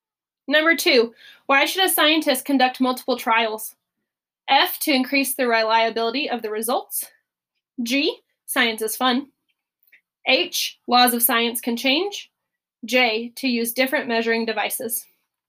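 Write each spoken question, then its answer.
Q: why should a scientist conduct multiple trials?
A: F: to increase the reliability of the results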